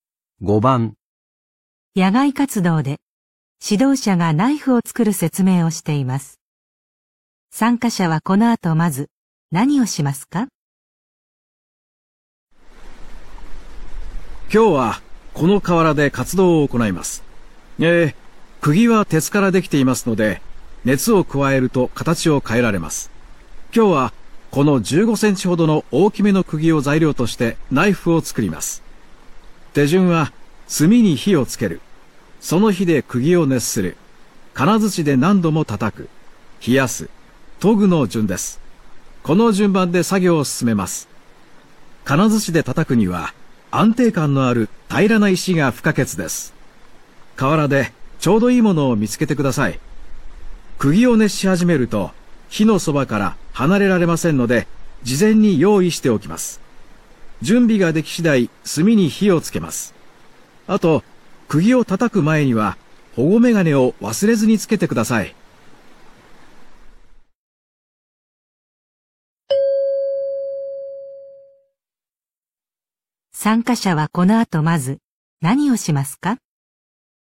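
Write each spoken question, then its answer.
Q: 参加者はこの後まず何をしますか?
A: 河原で平らな石を探す

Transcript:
野外活動で指導者がナイフを作る説明をしています。参加者はこの後、まず何をしますか。
男:今日はこの河原で活動を行います。えー、釘は鉄からできていますので熱を加えると形を変えられます。
手順は炭に火を付ける。その火で釘を熱する。金づちで何度も叩く。冷やす。研ぐの順です。この順番で作業を進めます。金づちで叩くには安定感のある平らな石が不可欠です。
河原でちょうどいいものを見つけてください。釘を熱し始めると火のそばから離れられませんので事前に用意しておきます。準備が出来次第、炭に火をつけます。あと、釘を叩く前には保護メガネを忘れずにつけてください。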